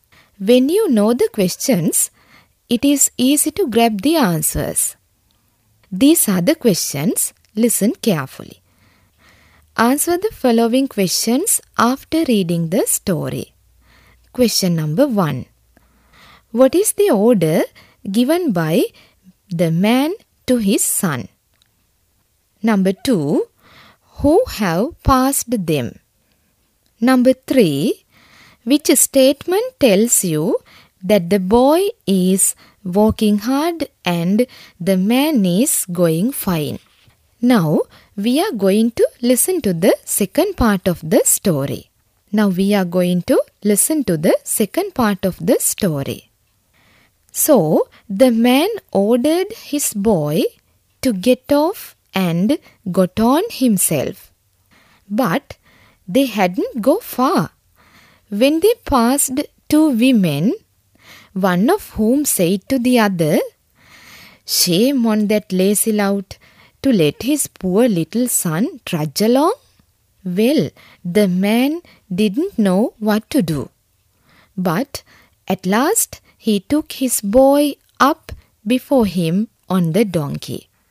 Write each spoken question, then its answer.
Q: What is the order given by the man to his son?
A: The man told him to get off from the donkey.

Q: Who have passed them?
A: Yes, the answer is two women.

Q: Which statement tells you that the boy is working hard and the man is going fine?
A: The answer is, shame on that lazy lout to let his poor son trudge along.